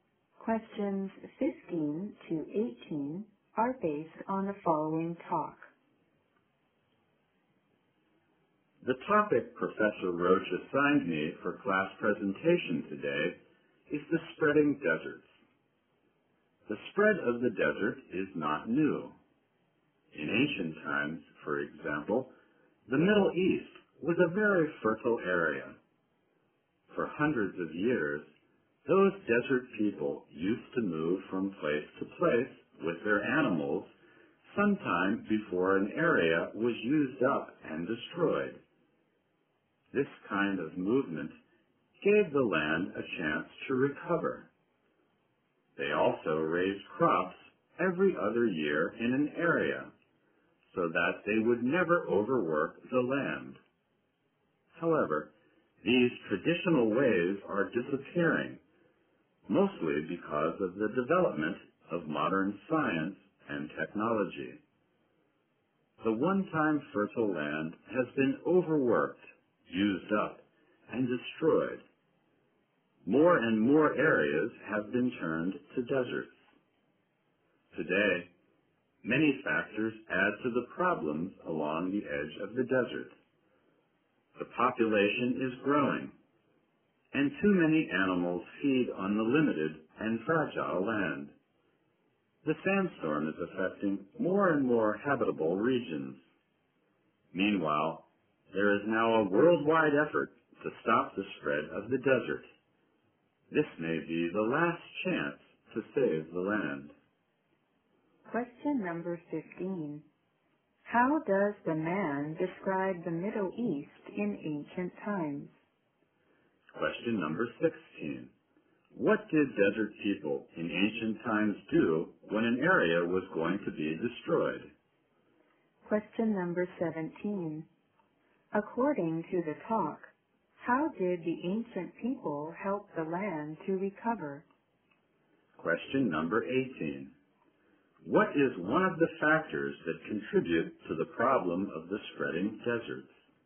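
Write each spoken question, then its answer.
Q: How does the man describe the Middle East in ancient times?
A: As a very fertile area

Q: What did desert people in ancient times do when an area was going to be destroyed?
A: They moved to another place with their animals

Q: According to the talk, how did the ancient people help the land to recover?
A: They moved from place to place and raised crops in an area only every other year

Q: What is one of the factors that contribute to the problem of the spreading deserts?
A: A growing population and too many animals feeding on the land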